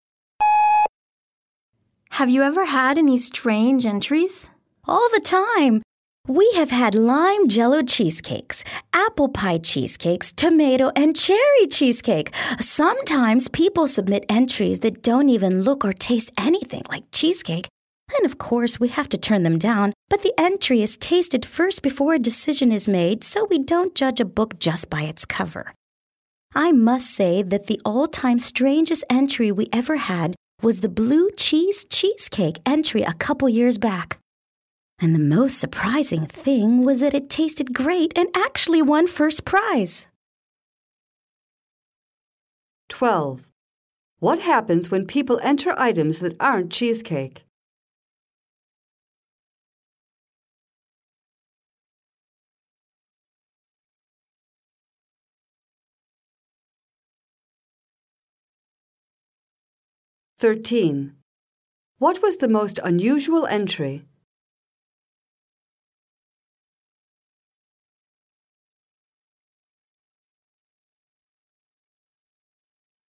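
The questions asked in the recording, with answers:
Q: What happens when people enter items that aren't cheesecake?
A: They are tasted first and then turned down

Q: What was the most unusual entry?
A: A blue cheese cheesecake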